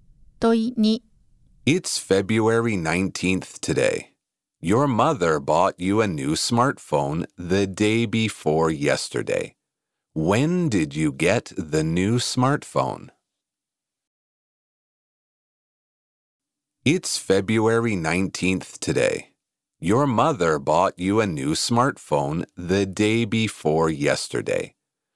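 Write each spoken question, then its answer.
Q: When did you get the new smartphone?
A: February 17th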